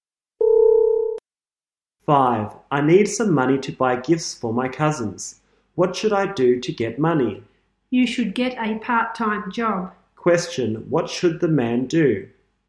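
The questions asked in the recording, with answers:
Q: Question, what should the man do?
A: Get a part-time job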